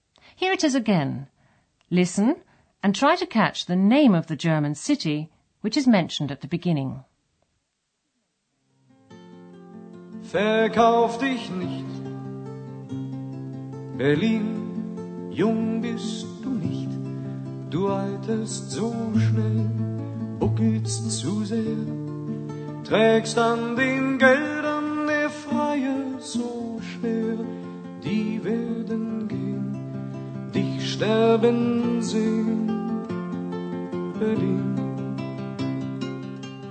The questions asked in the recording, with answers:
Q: Listen and try to catch the name of the German city which is mentioned at the beginning.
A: Berlin. Berlin.